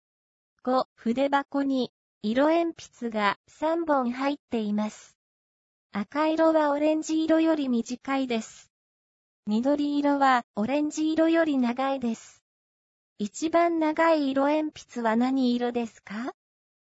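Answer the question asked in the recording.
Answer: 緑色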